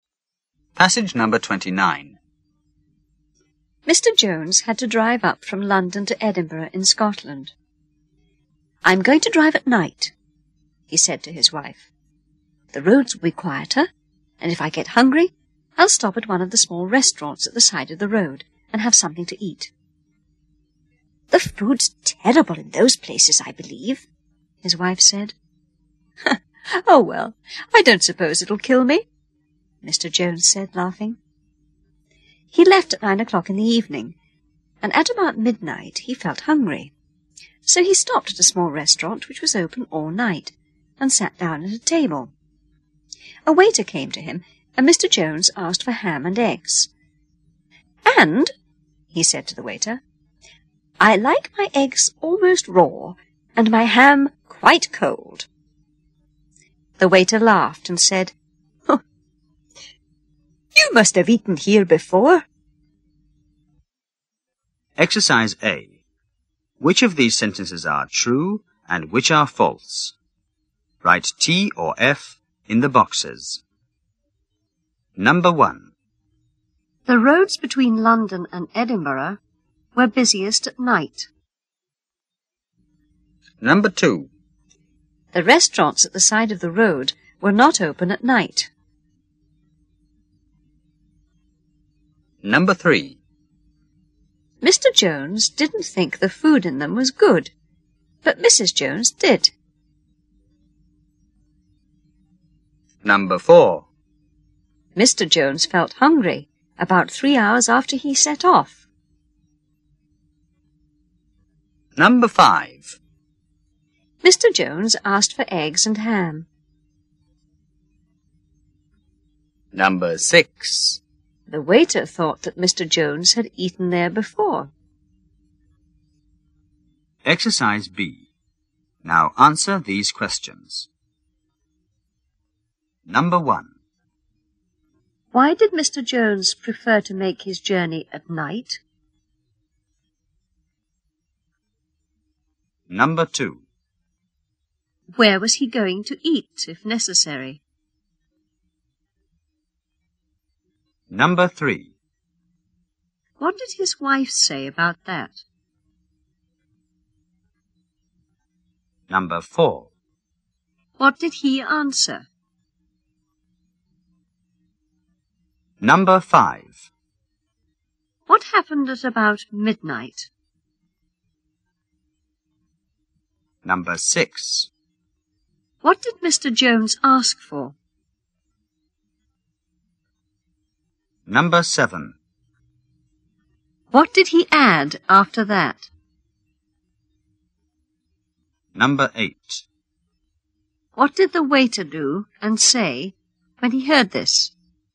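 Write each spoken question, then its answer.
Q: Why did Mr. Jones prefer to make his journey at night?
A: Because the roads would be quieter.

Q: Where was he going to eat, if necessary?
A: At one of the small restaurants at the side of the road.

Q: What did his wife say about that?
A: That the food was terrible in those places.

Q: What did he answer?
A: "I don't suppose it'll kill me."

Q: What happened at about midnight?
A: He felt hungry and stopped at a small all-night restaurant.

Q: What did Mr. Jones ask for?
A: Ham and eggs.

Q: What did he add after that?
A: That he liked his eggs almost raw and his ham quite cold.

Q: What did the waiter do and say when he heard this?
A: He laughed and said, "You must have eaten here before."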